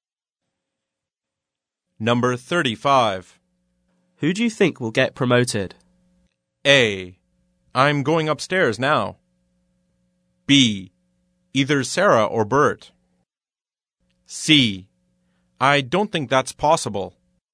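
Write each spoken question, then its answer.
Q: Who do you think will get promoted?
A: B: Either Sarah or Bert.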